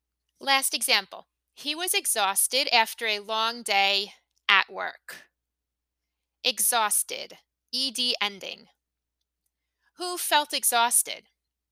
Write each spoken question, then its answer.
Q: Who felt exhausted?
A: He felt exhausted.